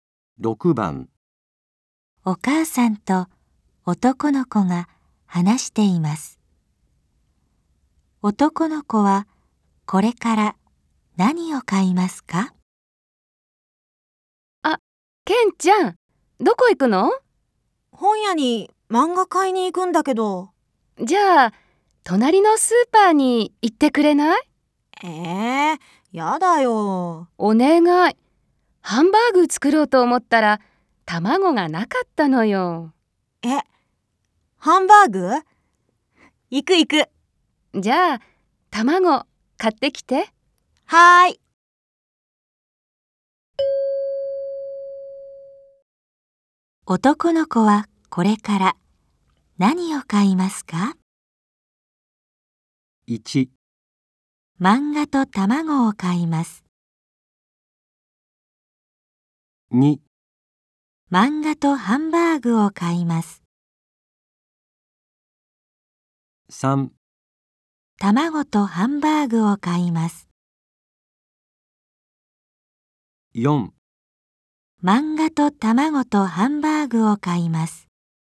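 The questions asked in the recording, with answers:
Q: 男の子はこれから何を買いますか?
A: 1: 漫画と卵を買います。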